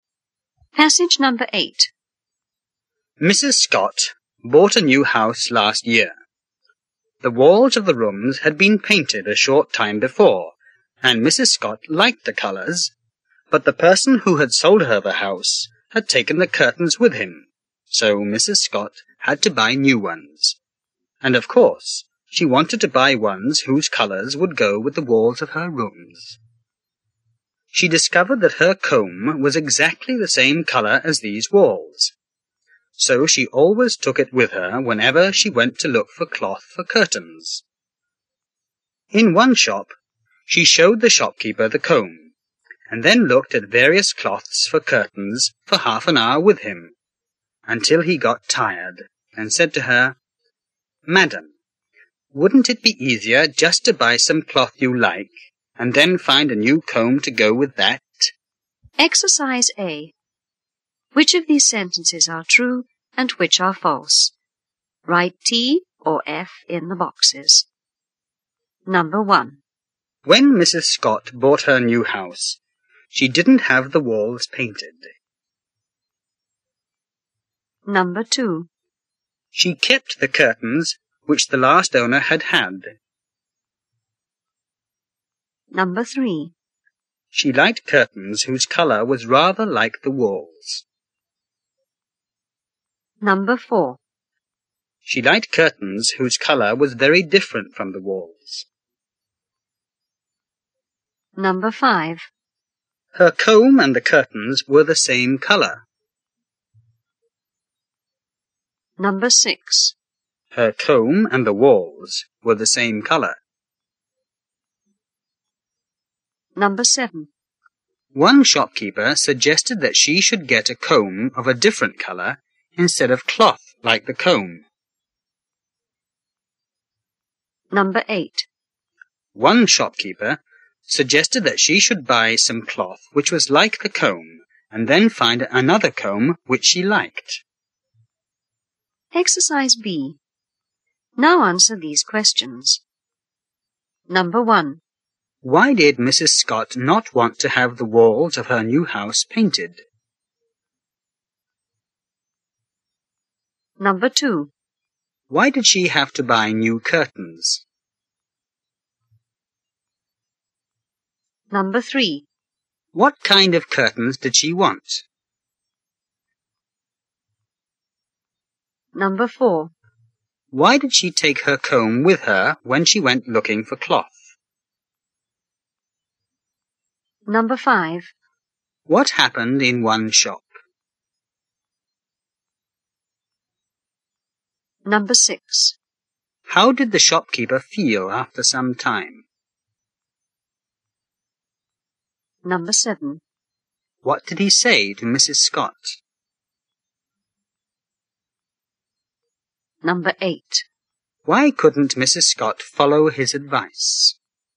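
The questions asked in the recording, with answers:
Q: Why did Mrs. Scott not want to have the walls of her new house painted?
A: They had been painted a short time before and she liked the colours.

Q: Why did she have to buy new curtains?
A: The seller had taken the curtains with him.

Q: What kind of curtains did she want?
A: Ones whose colours would go with the walls.

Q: Why did she take her comb with her when she went looking for cloth?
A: It was exactly the same colour as the walls.

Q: What happened in one shop?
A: She showed the shopkeeper the comb and looked at cloths with him for half an hour until he got tired.

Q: How did the shopkeeper feel after some time?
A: Tired.

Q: What did he say to Mrs. Scott?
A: Wouldn't it be easier to buy some cloth you like and then find a new comb to go with that?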